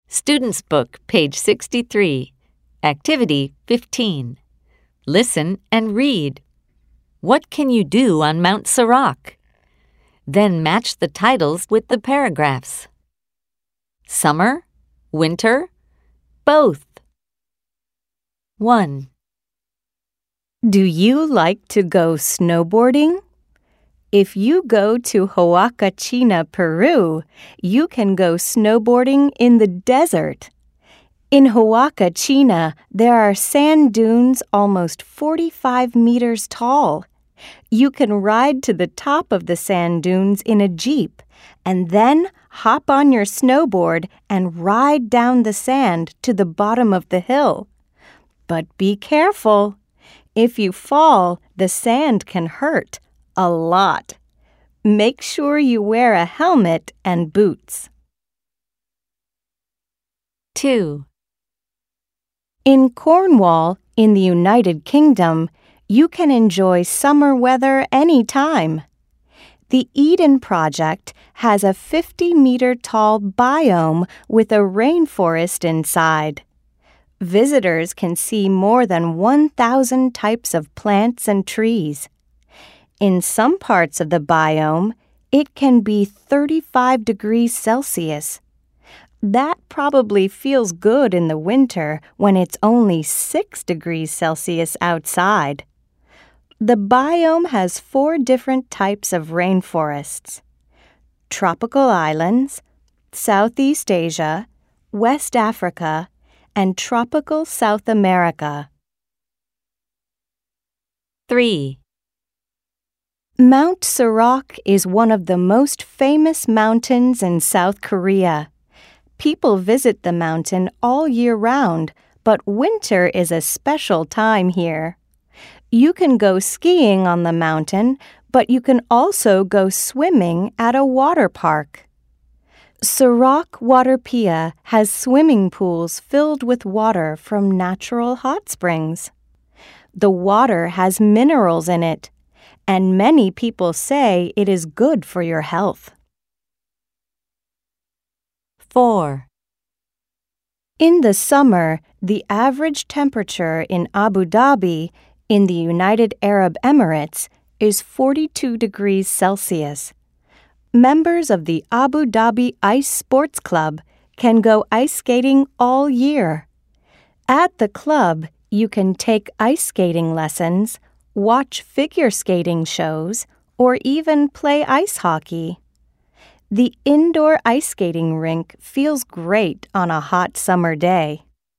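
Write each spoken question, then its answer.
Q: What can you do on Mount Sirac?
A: You can go skiing and swimming at a water park with hot spring water.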